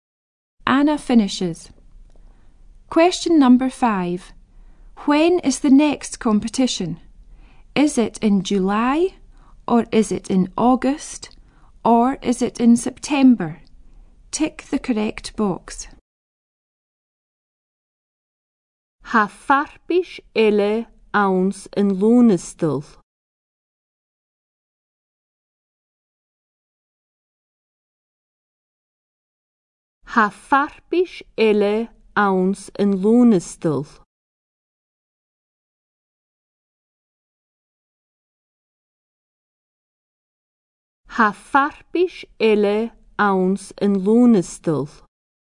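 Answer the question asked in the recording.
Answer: In August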